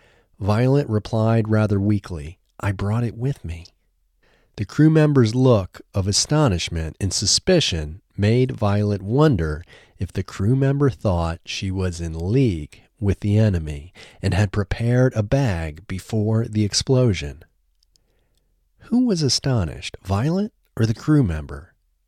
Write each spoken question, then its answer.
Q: Who was astonished, Violet or the crew member?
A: The crew member was astonished.